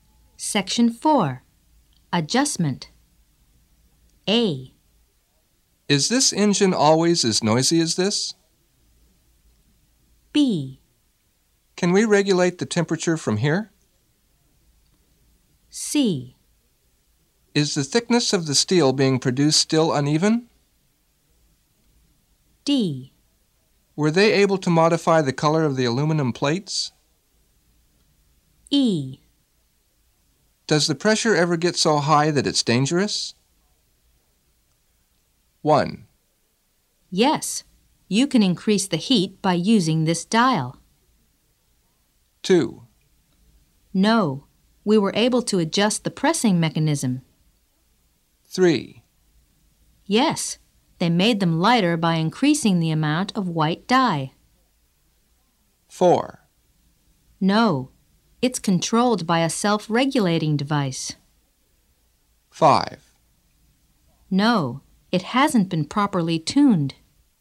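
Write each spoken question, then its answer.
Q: Yes, you can increase the heat by using this dial.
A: B: Can we regulate the temperature from here?

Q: No, we were able to adjust the pressing mechanism.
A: C: Is the thickness of the steel being produced still uneven?

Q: Yes, they made them lighter by increasing the amount of white dye.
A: D: Were they able to modify the color of the aluminum plates?

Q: No, it's controlled by a self-regulating device.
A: E: Does the pressure ever get so high that it's dangerous?

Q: No, it hasn't been properly tuned.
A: A: Is this engine always as noisy as this?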